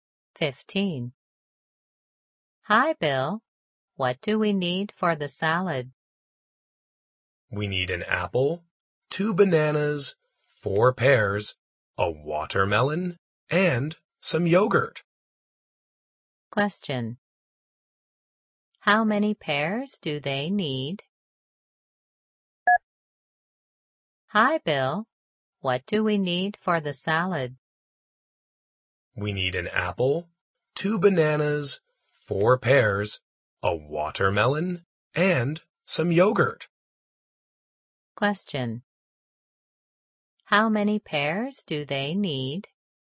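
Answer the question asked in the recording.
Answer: Four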